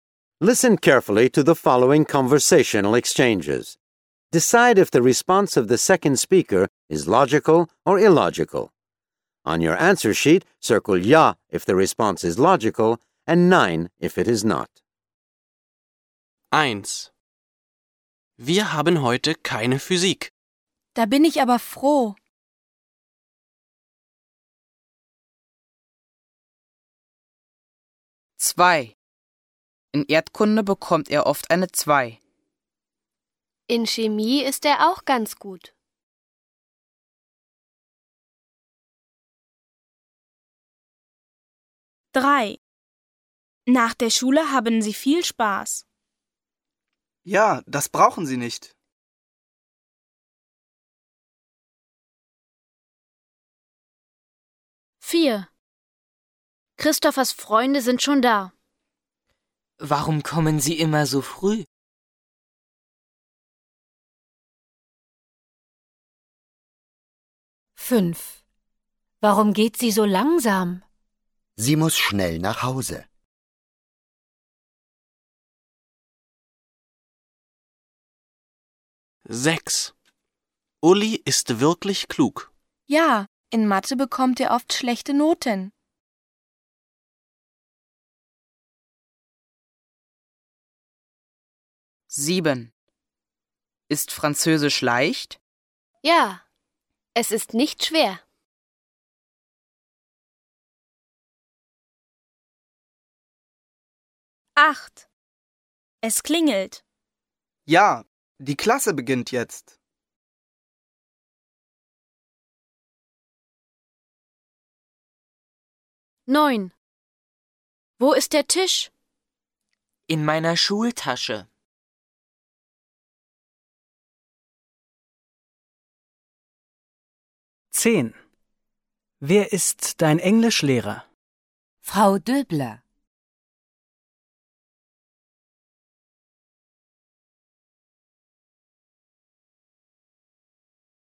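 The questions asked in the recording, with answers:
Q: Wir haben heute keine Physik. Da bin ich aber froh.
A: ja

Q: In Erdkunde bekommt er oft eine 2. In Chemie ist er auch ganz gut.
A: ja

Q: Nach der Schule haben Sie viel Spaß. Ja, das brauchen Sie nicht.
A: nein

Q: Warum geht sie so langsam? Sie muss schnell nach Hause.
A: nein

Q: Uli ist wirklich klug. Ja. In Mathe bekommt er oft schlechte Noten.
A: nein

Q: Ist Französisch leicht? Ja, es ist nicht schwer.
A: ja

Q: Es klingelt. Ja, die Klasse beginnt jetzt.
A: ja

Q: Wo ist der Tisch? In meiner Schultasche.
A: nein

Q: Wer ist dein Englischlehrer? Frau Döbler.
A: ja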